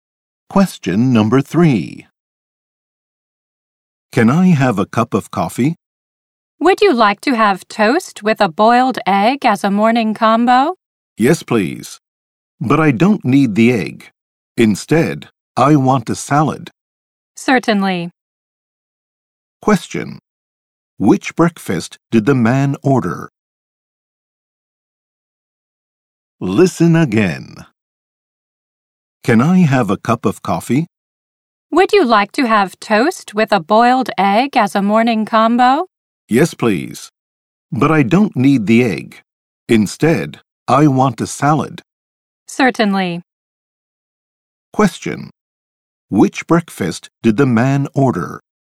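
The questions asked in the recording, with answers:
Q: Which breakfast did the man order?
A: Coffee, toast and a salad (no egg)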